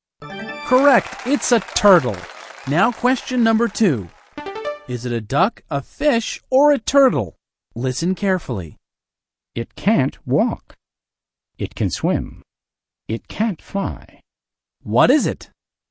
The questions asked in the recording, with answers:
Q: What is it?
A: It's a fish.